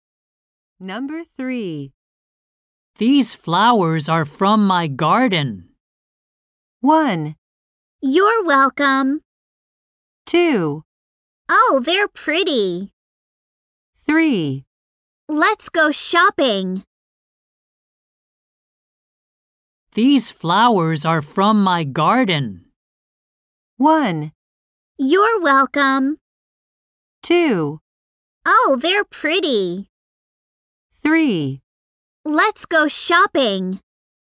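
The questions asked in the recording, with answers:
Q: These flowers are from my garden.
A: 2: Oh, they're pretty.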